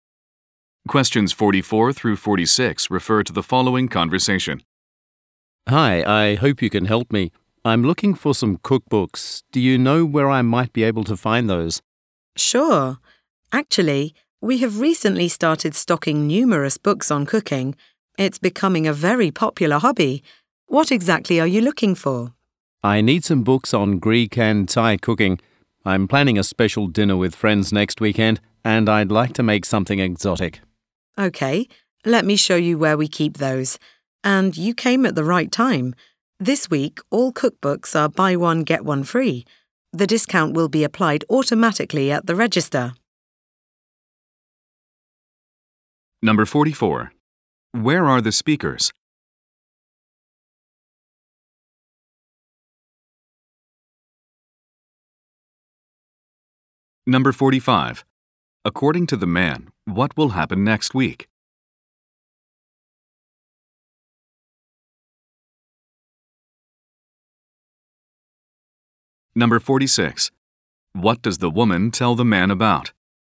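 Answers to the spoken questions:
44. In a bookstore
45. He will have a special dinner with friends
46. A buy-one-get-one-free offer on cookbooks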